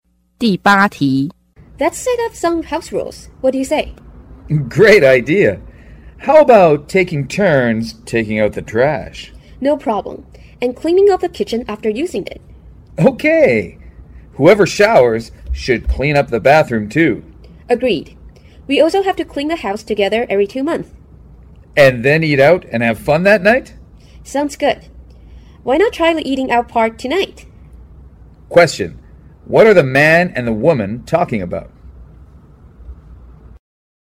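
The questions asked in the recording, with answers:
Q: What are the man and the woman talking about?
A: House rules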